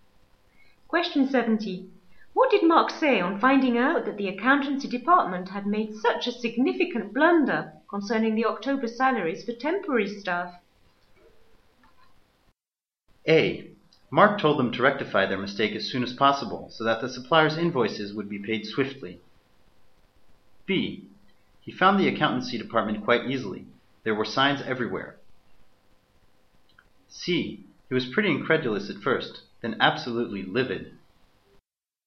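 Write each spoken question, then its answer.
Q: What did Mark say on finding out that the accountancy department had made such a significant blunder concerning the October salaries for temporary staff?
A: C: He was pretty incredulous at first, then absolutely livid.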